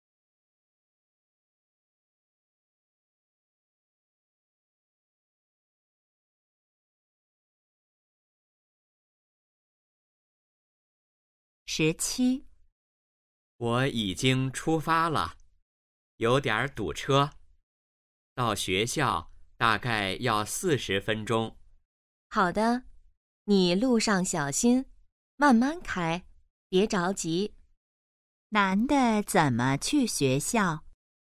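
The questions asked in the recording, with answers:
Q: 男的怎么去学校?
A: 开车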